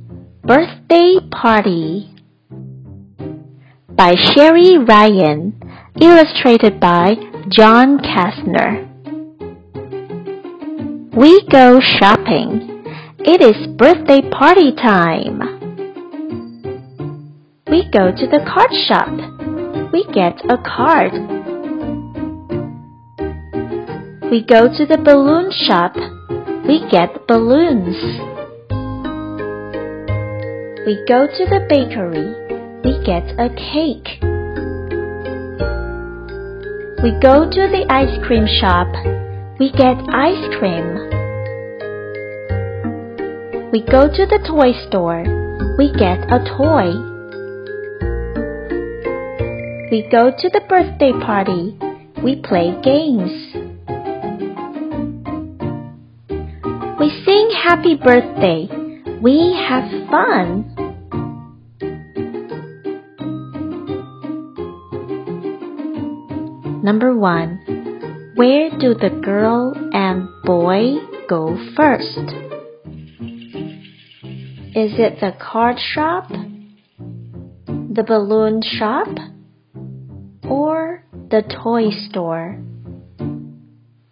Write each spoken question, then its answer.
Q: Number one, where do the girl and boy go first? Is it the card shop, the balloon shop, or the toy store?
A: The answer is the card shop.